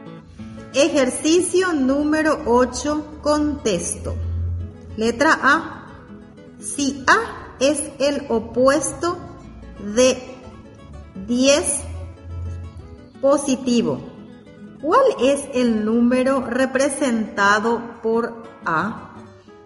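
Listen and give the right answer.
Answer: -10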